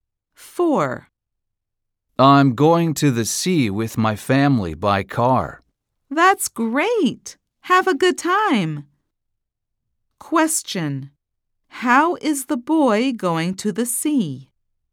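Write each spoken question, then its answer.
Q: How is the boy going to the sea?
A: by car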